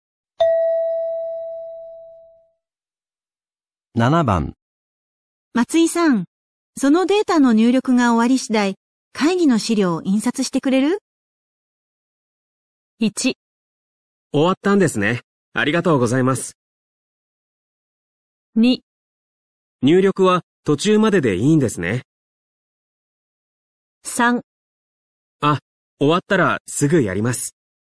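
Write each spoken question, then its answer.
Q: 松井さん、そのデータの入力が終わり次第、会議の資料を印刷してくれる?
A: 3: あ、終わったらすぐやります。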